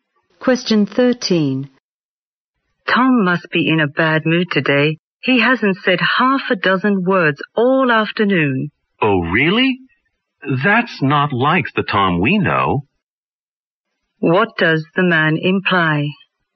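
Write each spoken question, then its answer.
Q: What does the man imply?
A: Tom is usually talkative.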